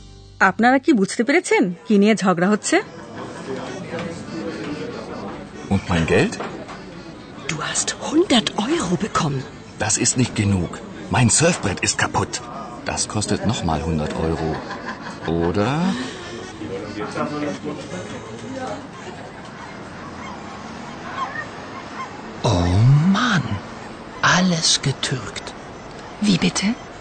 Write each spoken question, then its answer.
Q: আপনারা কি বুঝতে পেরেছেন কি নিয়ে ঝগড়া হচ্ছে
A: ঝগড়া হচ্ছে টাকা নিয়ে